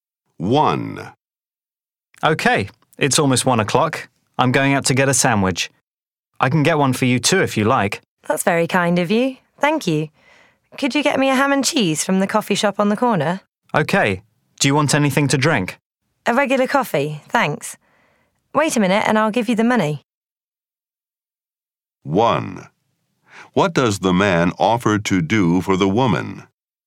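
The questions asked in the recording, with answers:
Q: What does the man offer to do for the woman?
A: To get her a sandwich (and a drink)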